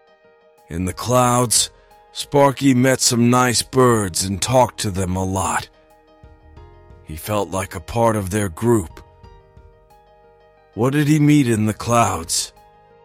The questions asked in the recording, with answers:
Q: What did he meet in the clouds?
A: Some nice birds. He met some nice birds in the clouds.